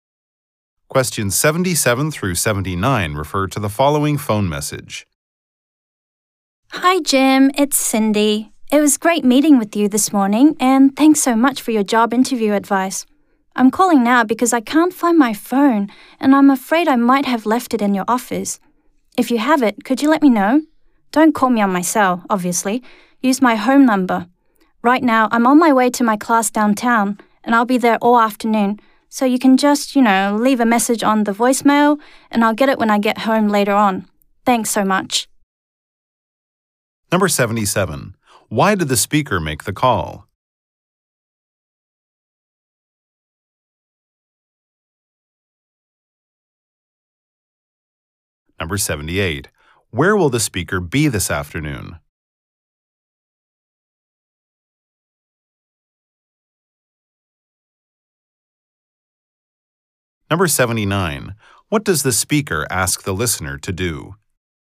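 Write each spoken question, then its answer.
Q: Why did the speaker make the call?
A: She may have left her phone in his office

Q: Where will the speaker be this afternoon?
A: At her class downtown

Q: What does the speaker ask the listener to do?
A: Leave a message on her home voicemail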